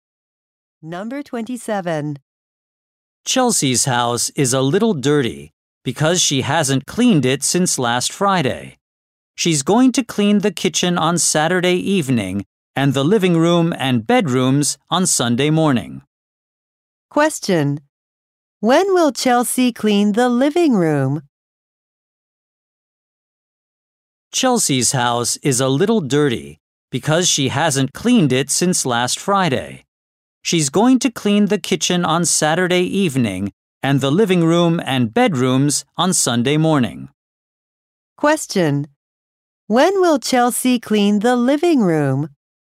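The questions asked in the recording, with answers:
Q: When will Chelsea clean the living room?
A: On Sunday morning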